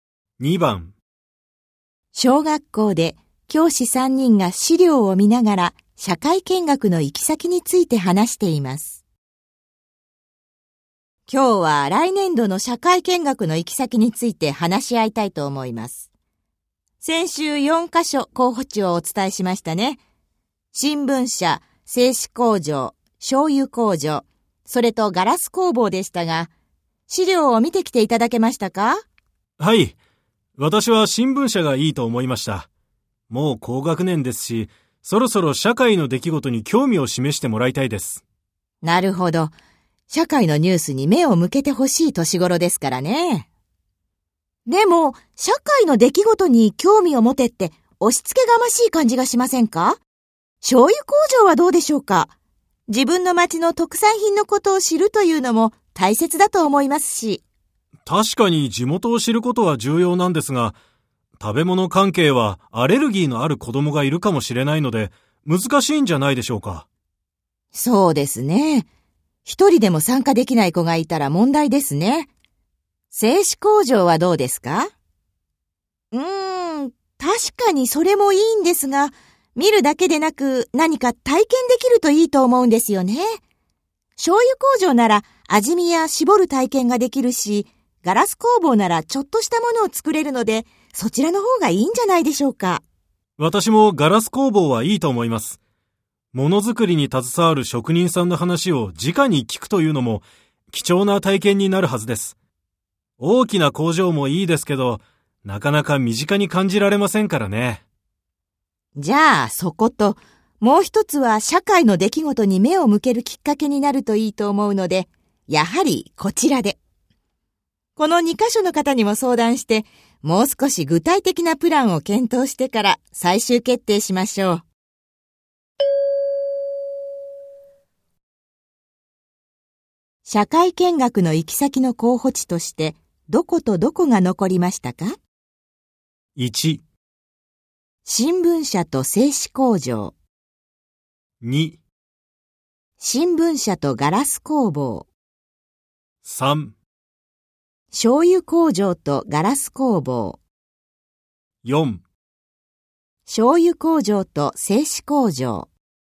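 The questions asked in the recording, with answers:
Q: 社会見学の行き先の候補地として、どことどこが残りましたか?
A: 2: 新聞社とガラス工房。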